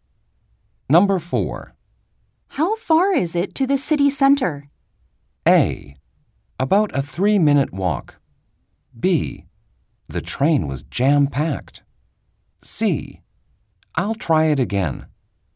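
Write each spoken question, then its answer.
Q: How far is it to the city center?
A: A: About a 3-minute walk.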